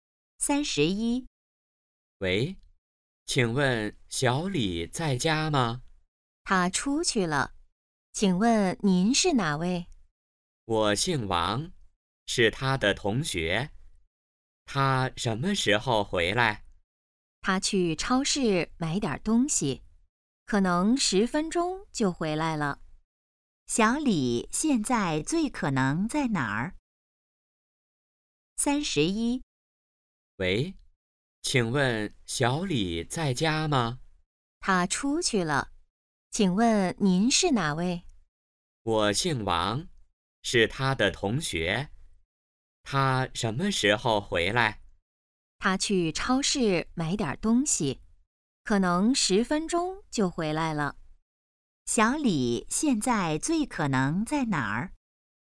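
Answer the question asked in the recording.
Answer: 超市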